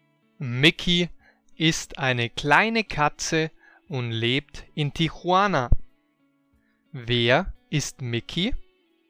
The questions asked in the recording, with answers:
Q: Wer ist Mickey?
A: Eine kleine Katze. Mickey ist eine kleine Katze.